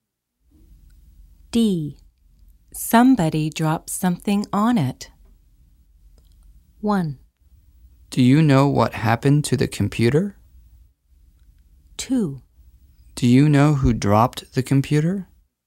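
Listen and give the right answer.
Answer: 1: Do you know what happened to the computer?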